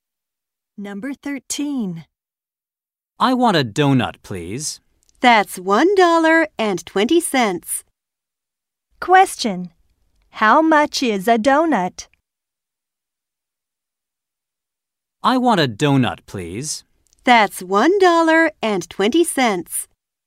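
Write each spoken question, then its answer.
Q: How much is a donut?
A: $1.20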